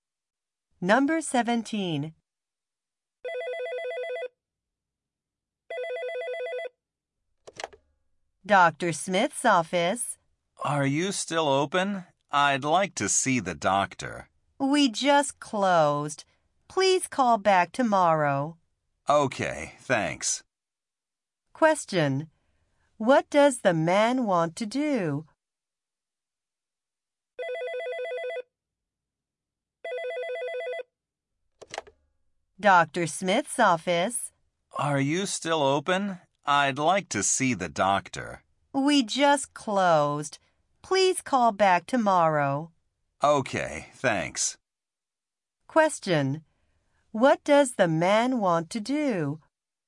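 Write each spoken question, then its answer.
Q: What does the man want to do?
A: See the doctor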